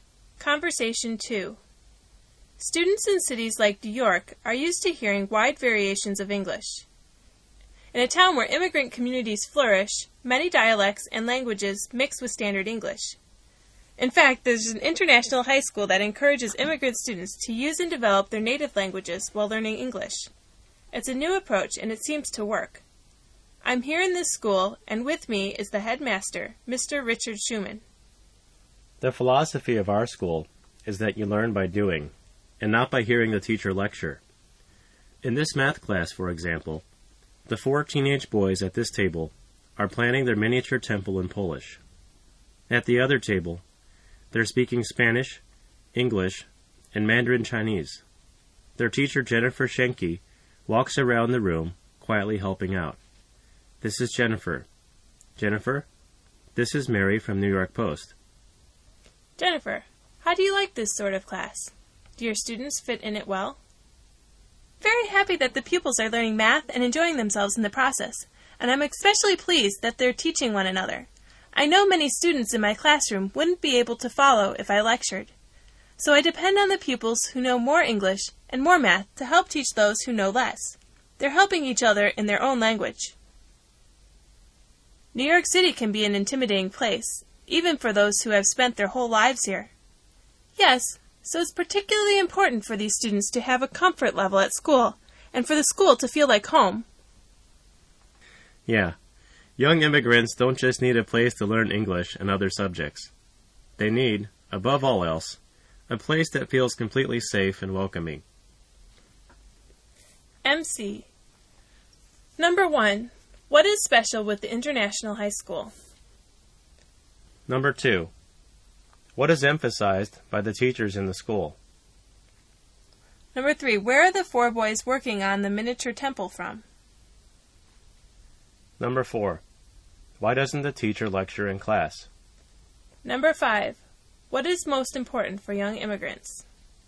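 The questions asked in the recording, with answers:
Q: What is special with the International High School?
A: It encourages immigrant students to use and develop their native languages while learning English

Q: What is emphasized by the teachers in the school?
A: Learning by doing, not by hearing the teacher lecture

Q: Where are the four boys working on the miniature temple from?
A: Poland

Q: Why doesn't the teacher lecture in class?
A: Many students wouldn't be able to follow a lecture

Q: What is most important for young immigrants?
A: A place that feels completely safe and welcoming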